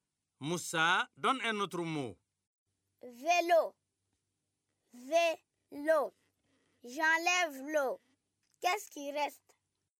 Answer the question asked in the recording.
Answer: CV, monsieur.